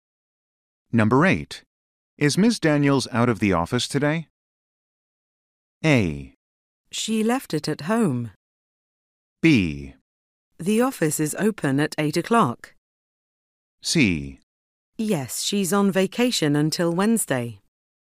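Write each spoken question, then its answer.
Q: Is Ms. Daniels out of the office today?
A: C: Yes, she's on vacation until Wednesday.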